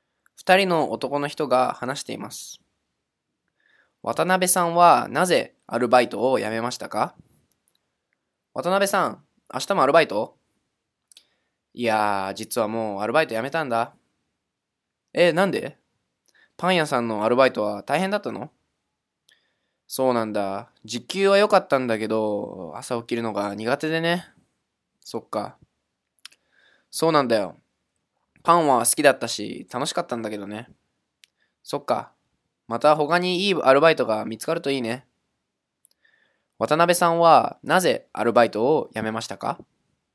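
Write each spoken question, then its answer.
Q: 渡辺さんはなぜアルバイトを辞めましたか?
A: 朝起きるのが苦手だから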